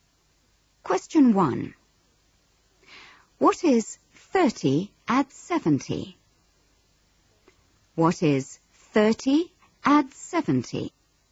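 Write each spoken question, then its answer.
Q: What is 30 add 70?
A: 100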